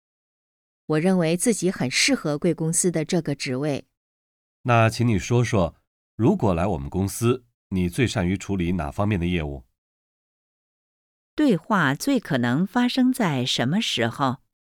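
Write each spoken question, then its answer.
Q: 对话最可能发生在什么时候?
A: 面试的时候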